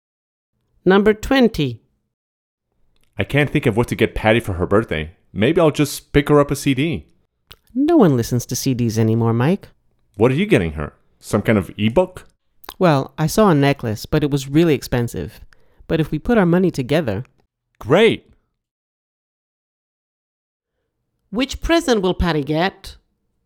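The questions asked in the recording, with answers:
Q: Which present will Patty get?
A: A necklace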